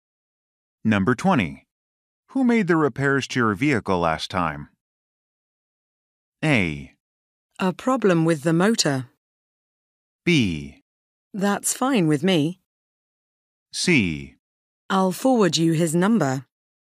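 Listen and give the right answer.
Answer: C: I'll forward you his number.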